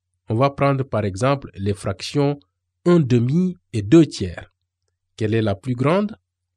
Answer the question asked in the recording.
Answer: 2 tiers?